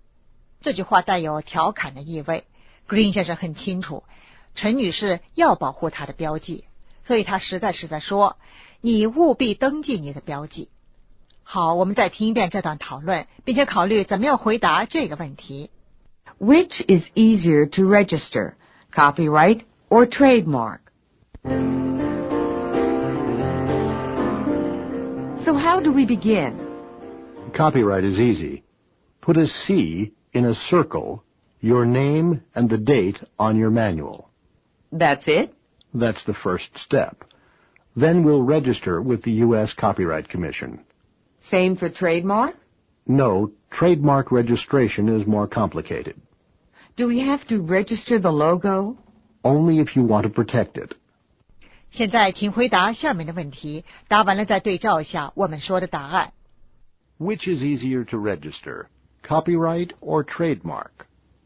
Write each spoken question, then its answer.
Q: Which is easier to register, copyright or trademark?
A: A copyright.